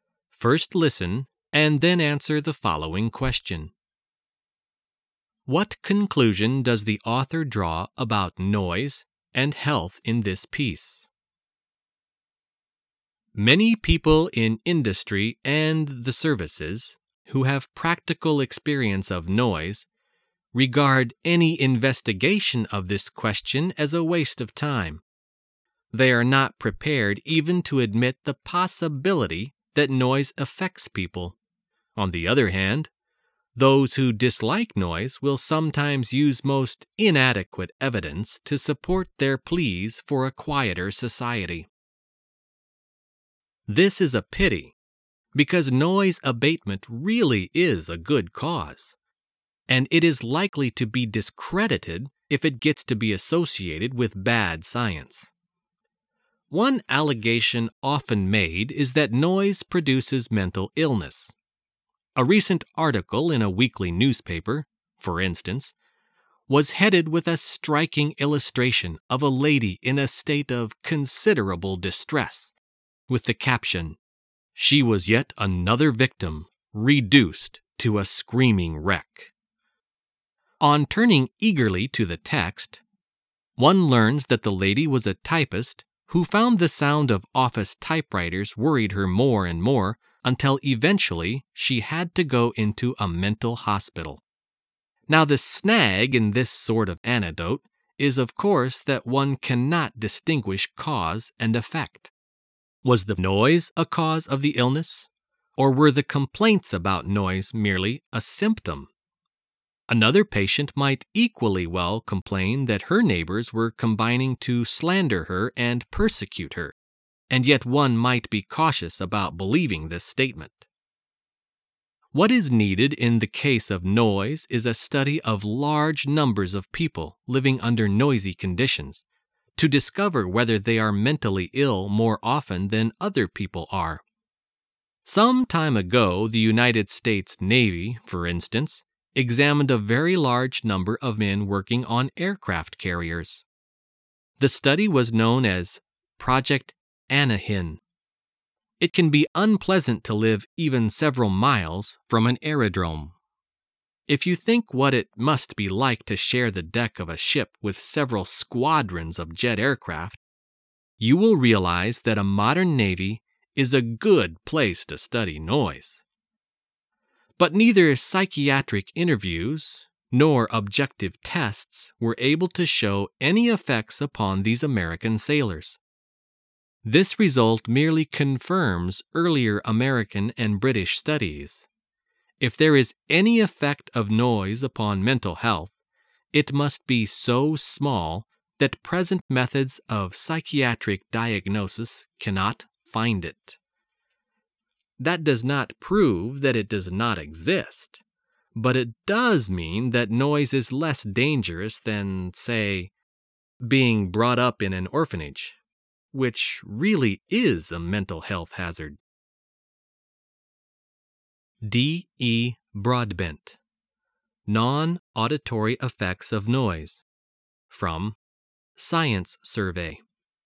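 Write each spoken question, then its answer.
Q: What conclusion does the author draw about noise and health in this piece?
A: Any effect of noise on mental health is too small to detect with present methods; noise is less dangerous than often claimed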